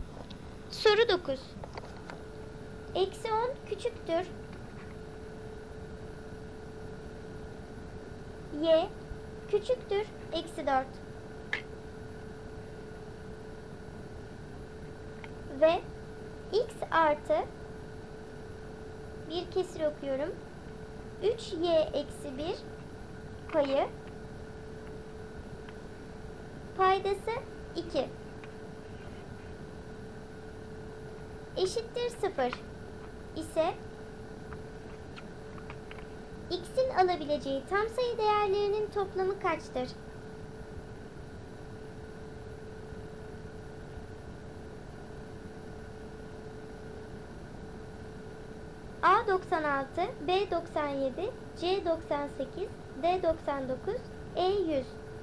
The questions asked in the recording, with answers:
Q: X'in alabileceği tam sayı değerlerinin toplamı kaçtır?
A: Doğru cevap D 99.